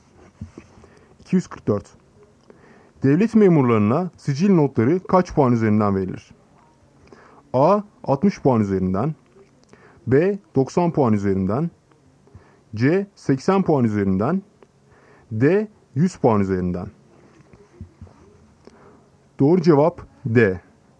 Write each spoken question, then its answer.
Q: Devlet memurlarına sicil notları kaç puan üzerinden verilir?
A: Doğru cevap D. 100 puan üzerinden.